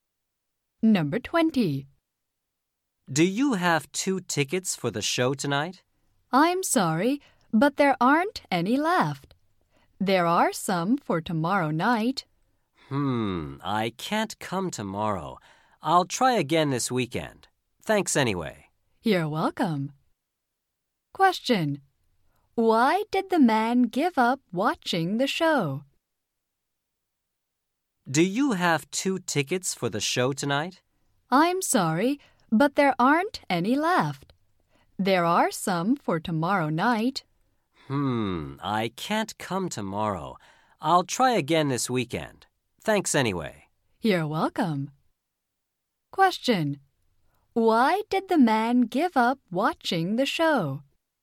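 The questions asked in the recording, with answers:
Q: Why did the man give up watching the show?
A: There were no tickets left for tonight.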